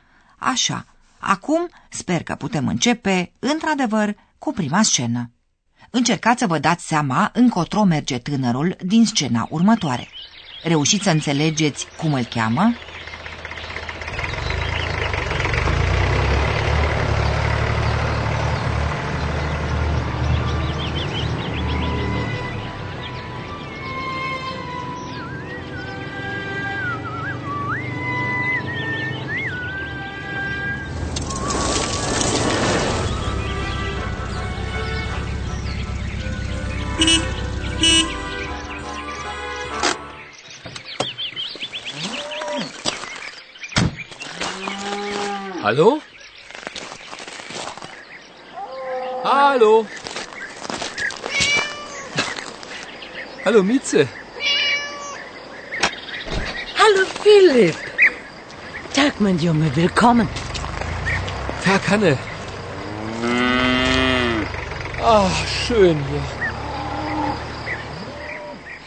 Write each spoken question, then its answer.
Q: Reușiți să înțelegeți cum îl cheamă?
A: Poate că ați înțeles și că pe tânăr îl cheamă Filip